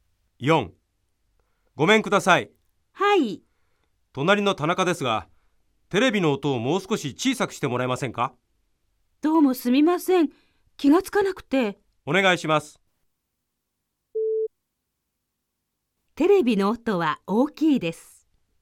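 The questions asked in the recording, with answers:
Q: テレビの音は大きいです。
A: ○(正しい)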